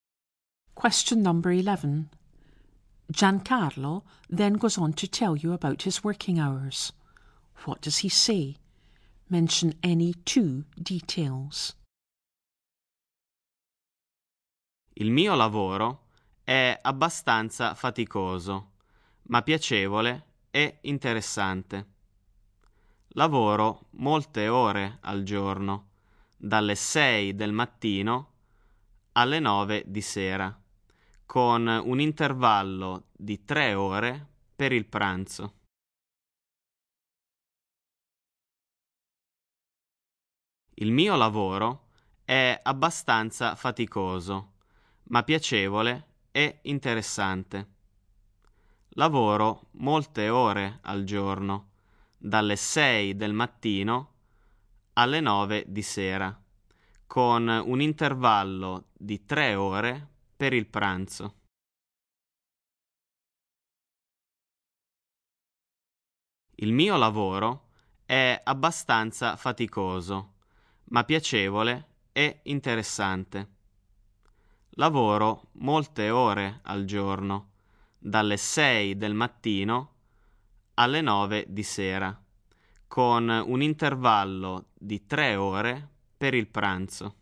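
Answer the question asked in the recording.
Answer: Any two: his job is quite tiring but pleasant and interesting; he works long hours, from 6 a.m. to 9 p.m.; he has a 3-hour lunch break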